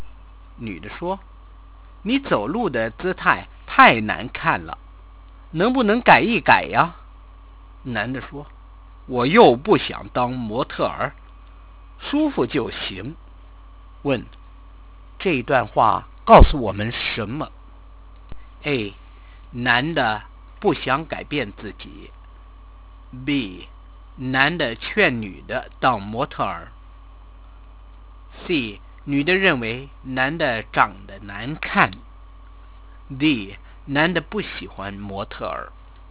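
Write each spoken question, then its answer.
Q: 问,这段话告诉我们什么?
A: A: 男的不想改变自己。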